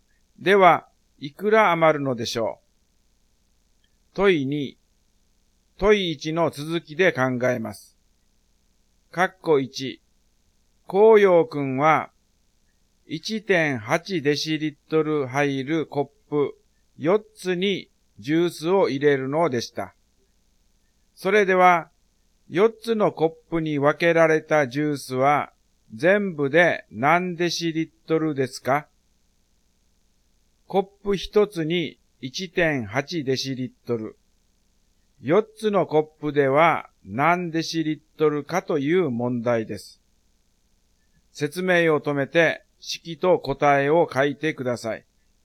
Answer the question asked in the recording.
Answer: 1.8×4 ですね。答えが 7.2 デシリットルです。